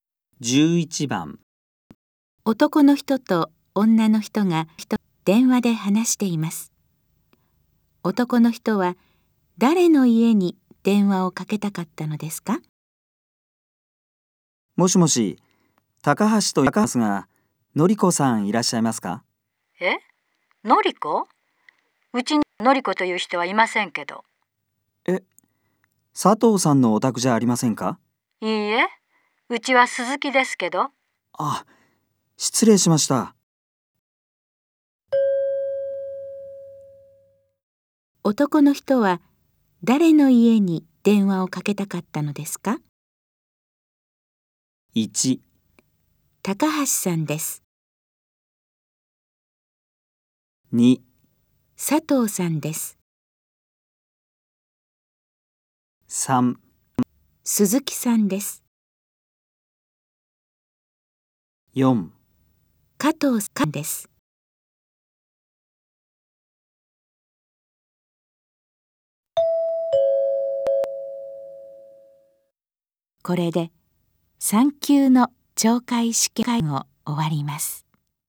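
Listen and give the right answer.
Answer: 2: 佐藤さんです。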